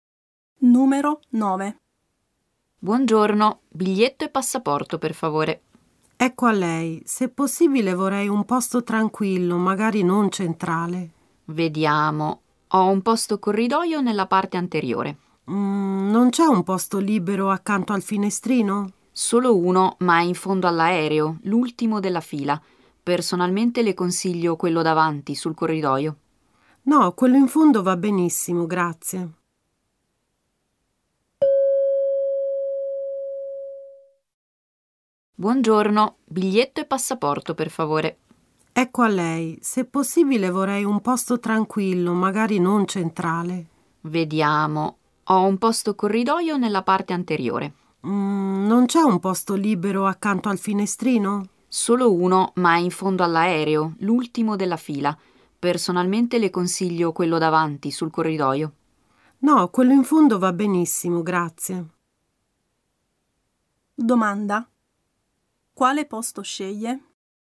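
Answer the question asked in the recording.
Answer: L'unico posto libero vicino al finestrino, in fondo all'aereo, l'ultimo della fila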